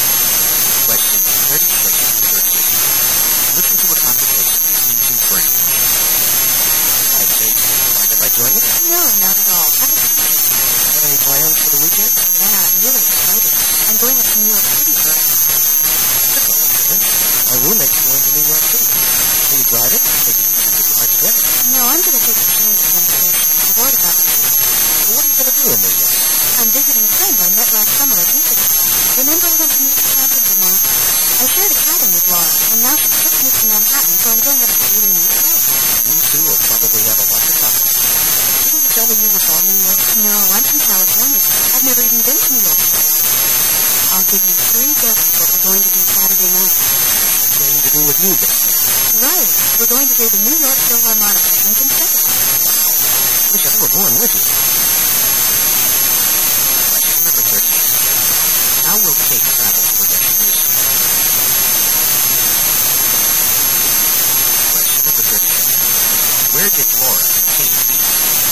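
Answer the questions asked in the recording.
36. By train
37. At a summer camp in Vermont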